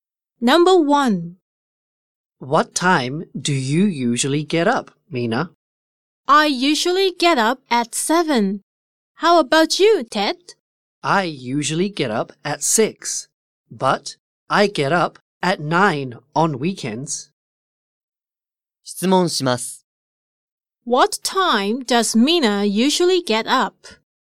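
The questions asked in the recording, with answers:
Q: What time does Mina usually get up?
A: At 7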